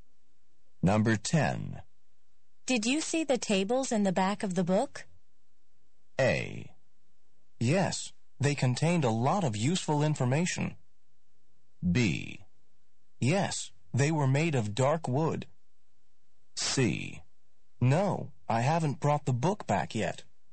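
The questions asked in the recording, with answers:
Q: Did you see the tables in the back of the book?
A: A: Yes, they contained a lot of useful information.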